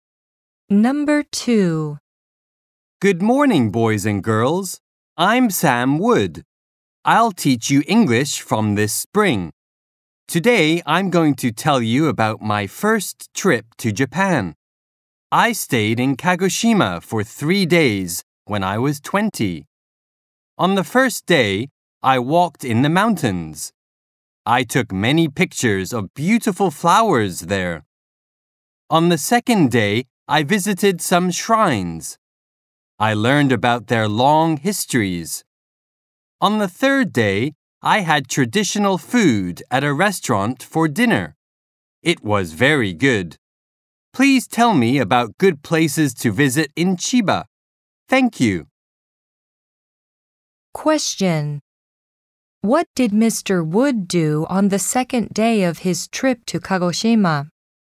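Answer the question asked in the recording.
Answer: He visited some shrines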